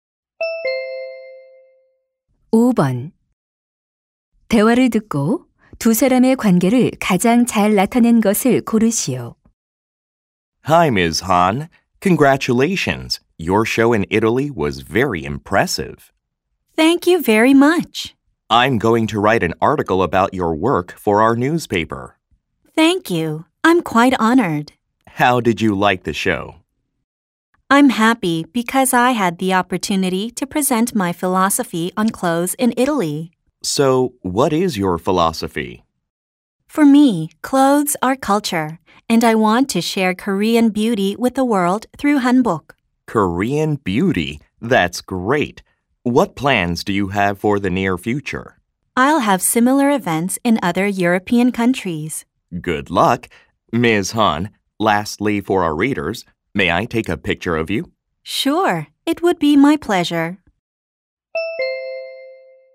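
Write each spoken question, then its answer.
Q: 두 사람의 관계를 가장 잘 나타낸 것을 고르시오.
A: 신문 기자 — 한복 디자이너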